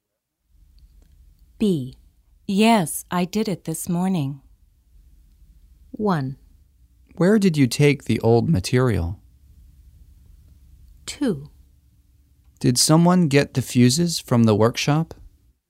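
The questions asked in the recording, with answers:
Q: Yes, I did it this morning.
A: 2: Did someone get the fuses from the workshop?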